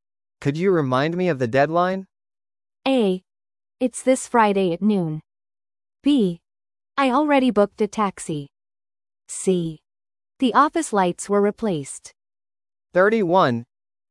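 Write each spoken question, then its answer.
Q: Could you remind me of the deadline?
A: A: It's this Friday at noon.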